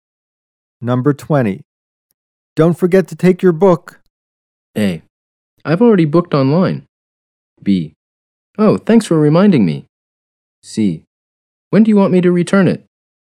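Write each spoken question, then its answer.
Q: Don't forget to take your book.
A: B: Oh, thanks for reminding me.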